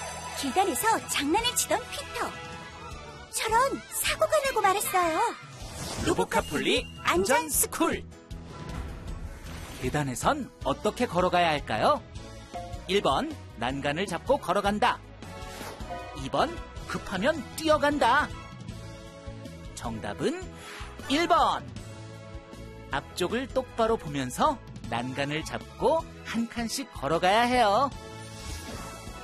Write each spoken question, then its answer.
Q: 계단에선 어떻게 걸어가야 할까요?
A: 정답은 1번.